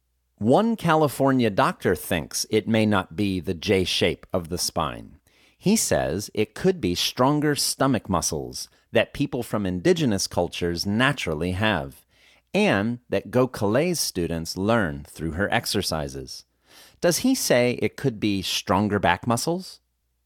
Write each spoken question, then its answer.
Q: Does he say it could be stronger back muscles?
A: No, he doesn't say it could be stronger back muscles.